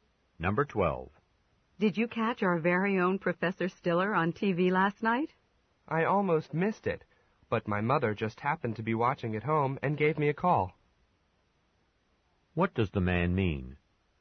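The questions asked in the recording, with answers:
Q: What does the man mean?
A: He saw the show because his mother called him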